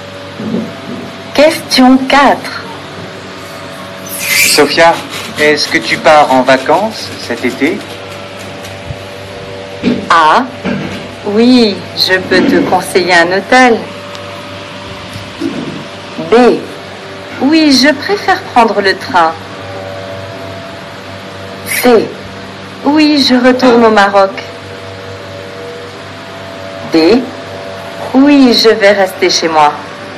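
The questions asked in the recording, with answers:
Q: Sophia, est-ce que tu pars en vacances cet été?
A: C: Oui, je retourne au Maroc.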